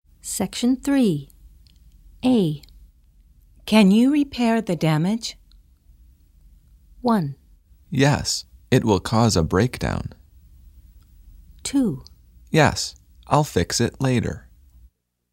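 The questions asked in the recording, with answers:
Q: Can you repair the damage?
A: 2: Yes, I'll fix it later.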